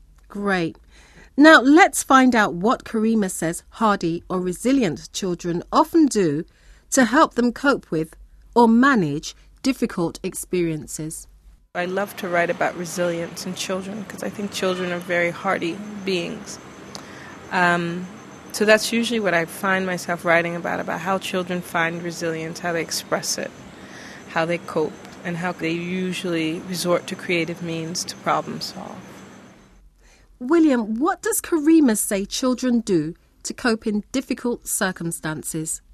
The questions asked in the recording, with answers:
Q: William, what does Karima say children do to cope in difficult circumstances?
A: She says that they usually resort to, or they turn to, creative means or new ideas to cope with their problems, because they can't find any other ways to do it.